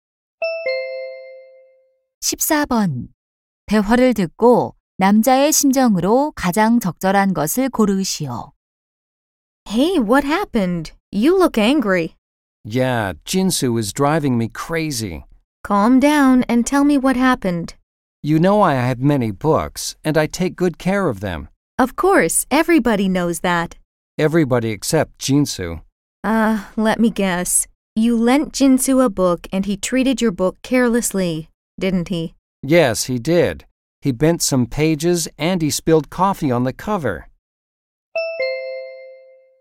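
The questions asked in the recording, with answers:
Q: 대화를 듣고 남자의 심정으로 가장 적절한 것을 고르시오.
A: 화남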